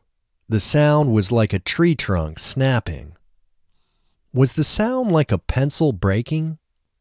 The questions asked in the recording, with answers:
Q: Was the sound like a pencil breaking?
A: No, the sound wasn't like a pencil breaking.